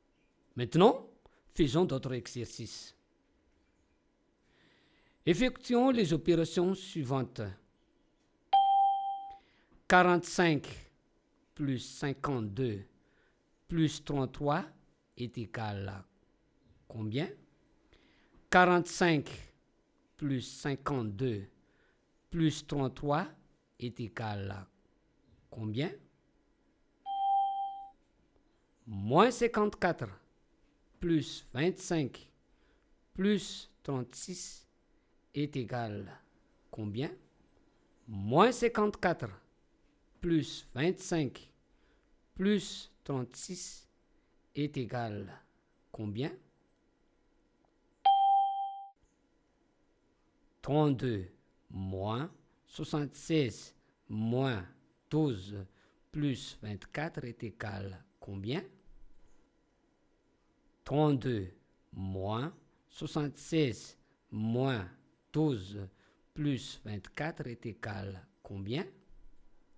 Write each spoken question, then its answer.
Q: 45 plus 52 plus 33 est égal à combien?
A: 45 plus 52 plus 33 est égal à plus 130.

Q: Moins 54 plus 25 plus 36 est égal à combien?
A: Moins 54 plus 25 plus 36 est égal à plus 7.

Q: 32 moins 76 moins 12 plus 24 est égal à combien?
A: 32 moins 76 moins 12 plus 24 est égal à moins 32.